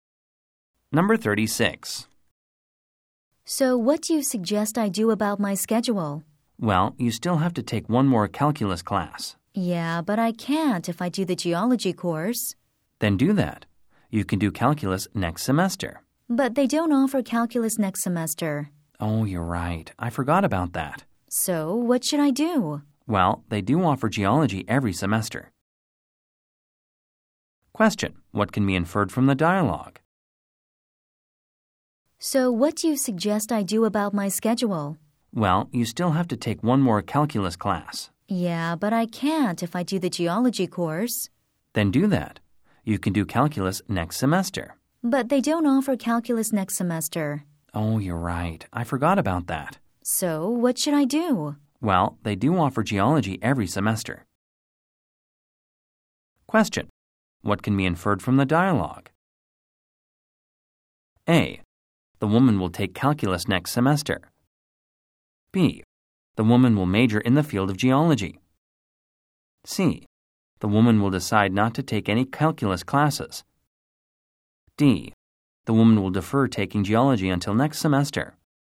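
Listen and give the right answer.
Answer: D: The woman will defer taking geology until next semester.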